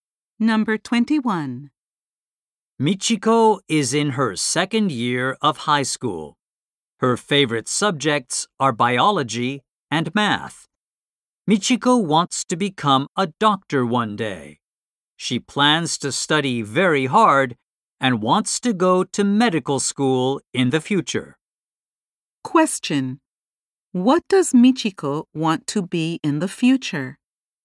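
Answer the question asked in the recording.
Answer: A doctor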